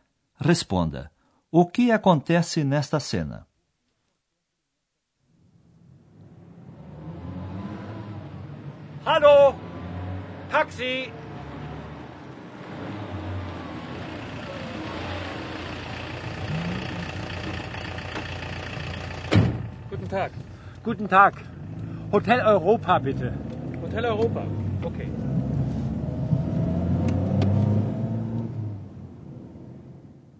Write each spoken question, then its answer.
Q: Responda: o que acontece nesta cena?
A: Um homem que está na rua chama um táxi, táxi, e diz ao motorista aonde quer ir, ao hotel, hotel.